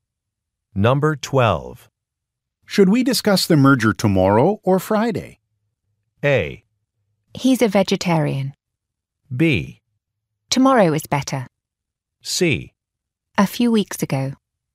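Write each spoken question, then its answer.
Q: Should we discuss the merger tomorrow or Friday?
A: B: Tomorrow is better.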